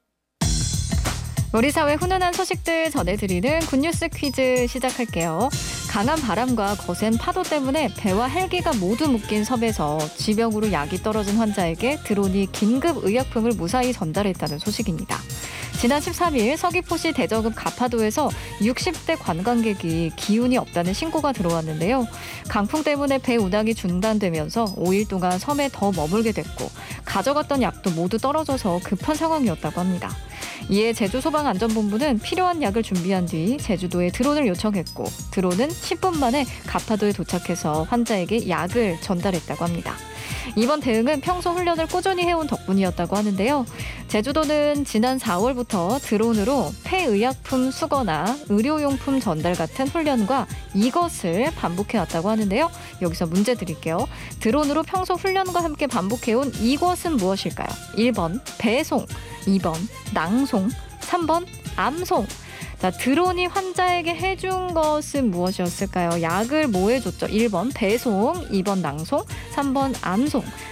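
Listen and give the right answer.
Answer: 1: 배송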